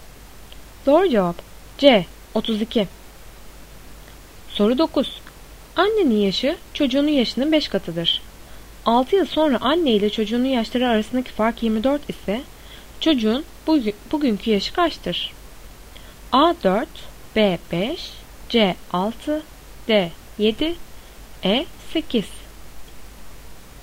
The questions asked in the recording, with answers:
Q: 6 yıl sonra anne ile çocuğunun yaşları arasındaki fark 24 ise çocuğun bugünkü yaşı kaçtır?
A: Doğru cevap C 6.